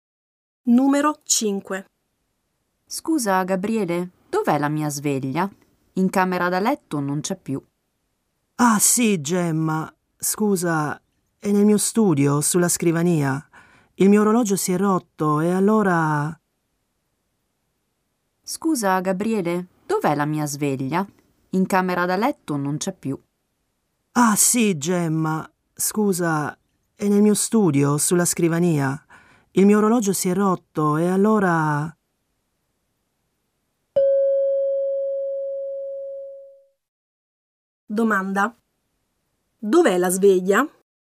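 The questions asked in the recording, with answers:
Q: Dov'è la sveglia?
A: Nello studio di Gabriele, sulla scrivania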